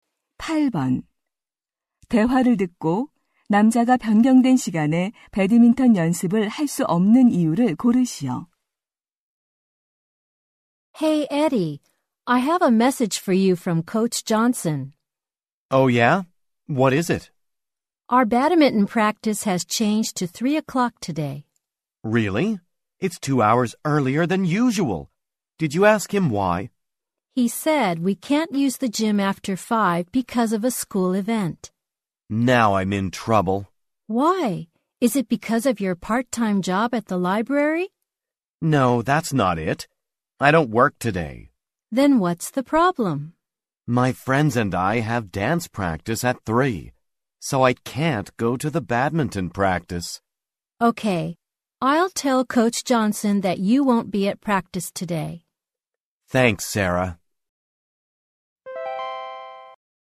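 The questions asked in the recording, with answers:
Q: 대화를 듣고 남자가 변경된 시간에 배드민턴 연습을 할 수 없는 이유를 고르시오.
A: 친구들과 댄스 연습이 있어서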